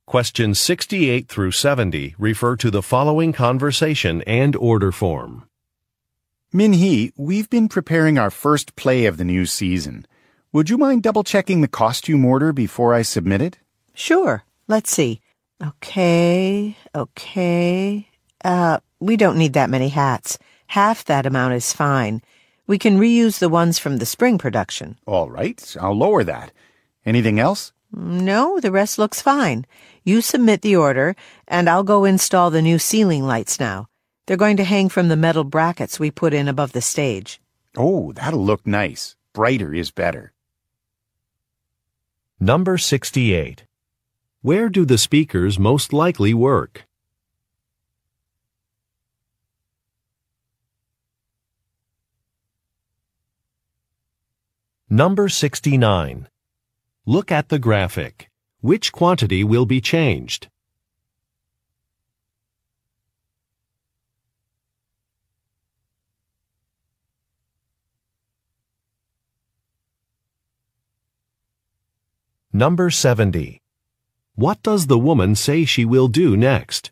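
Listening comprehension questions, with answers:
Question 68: Where do the speakers most likely work?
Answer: At a theater

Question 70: What does the woman say she will do next?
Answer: Hang some lights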